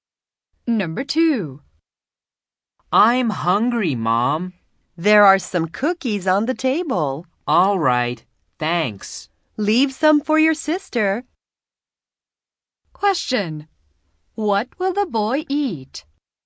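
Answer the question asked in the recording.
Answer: Some cookies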